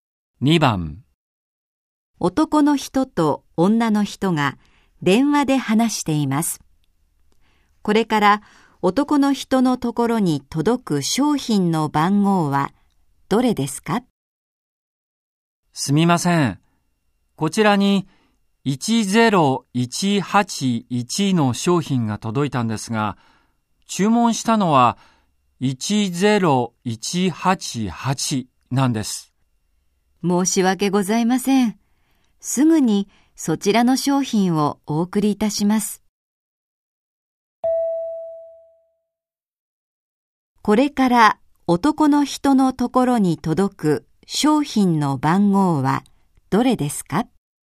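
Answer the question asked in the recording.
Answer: 10188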